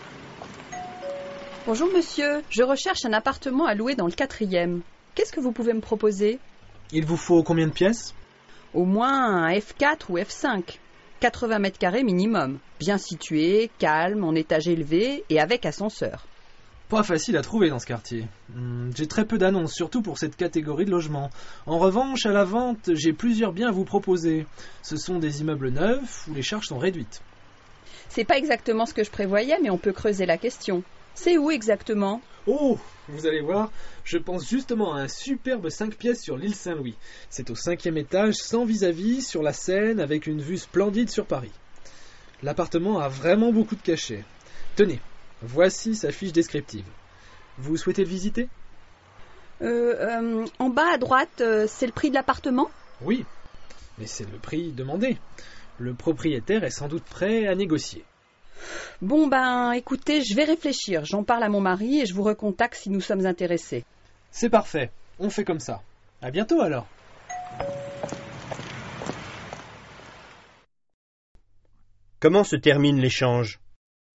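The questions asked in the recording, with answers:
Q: Comment se termine l'échange ?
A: La cliente va réfléchir, en parler à son mari et recontacter l'agent si intéressés.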